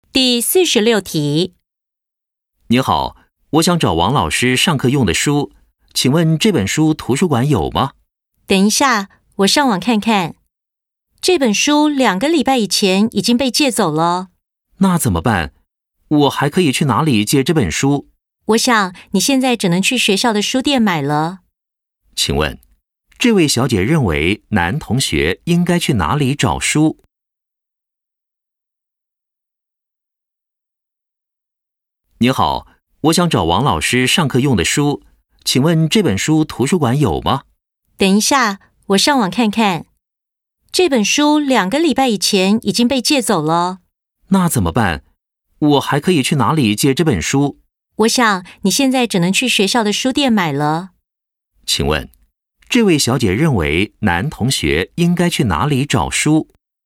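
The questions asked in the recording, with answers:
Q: 请问,这位小姐认为男同学应该去哪里找书?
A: 学校的书店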